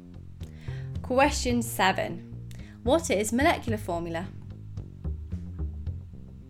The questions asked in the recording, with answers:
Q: What is molecular formula?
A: molecular formula doesn't show the structure, but it just shows the total number of each element in the molecule.